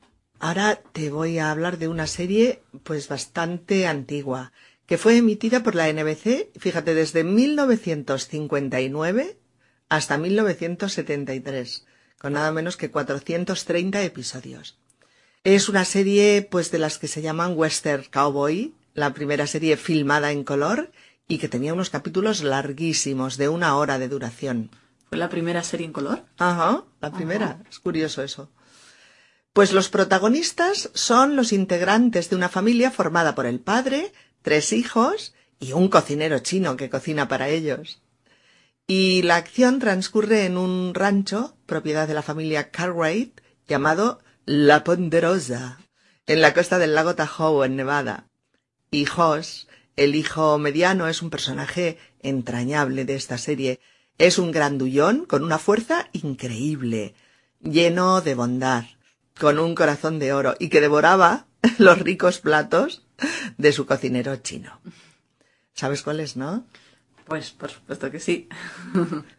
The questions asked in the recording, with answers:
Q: ¿Sabes cuál es, no?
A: Bonanza.